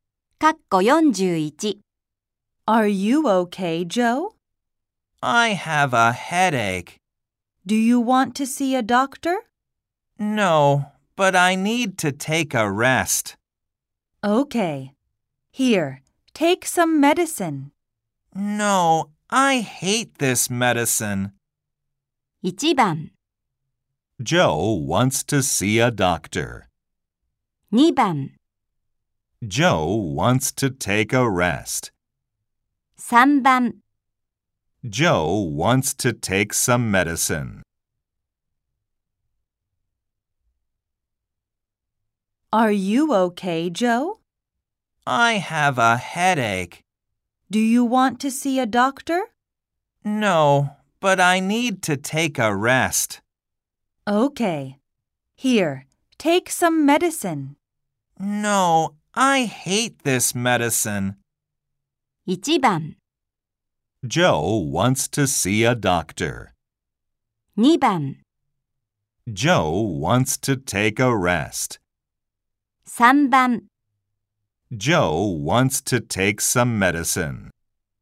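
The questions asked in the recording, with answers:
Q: 1番 Joe wants to see a doctor. 2番 Joe wants to take a rest. 3番 Joe wants to take some medicine.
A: 2: Joe wants to take a rest.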